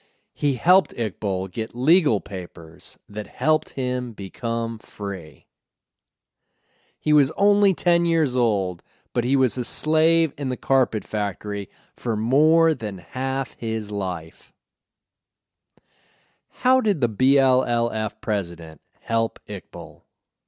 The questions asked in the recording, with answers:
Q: How did the BLLF president help Iqbal?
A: The BLLF president helped Iqbal get legal papers that helped him become free.